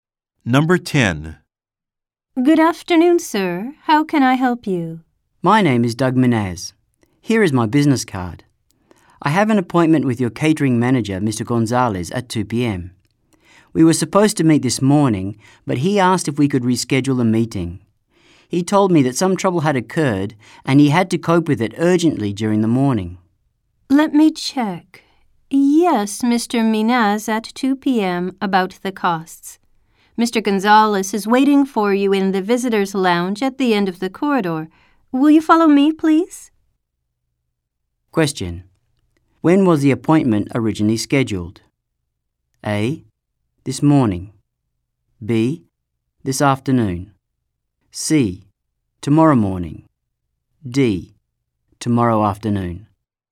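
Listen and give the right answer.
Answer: A: This morning.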